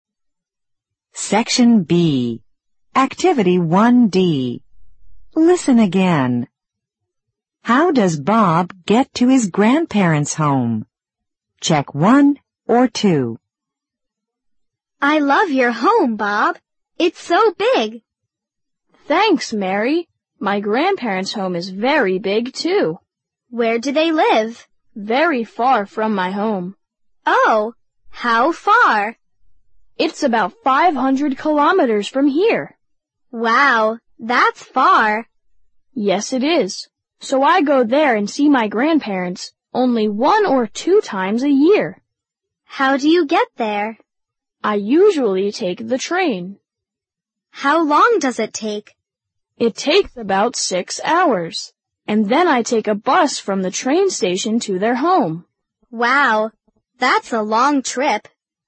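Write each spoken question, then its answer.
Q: How does Bob get to his grandparents' home?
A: He takes the train, then a bus from the station.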